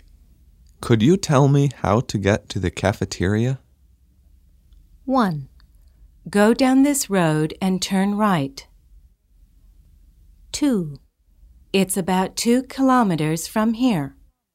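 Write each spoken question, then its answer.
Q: Could you tell me how to get to the cafeteria?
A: 1: Go down this road and turn right.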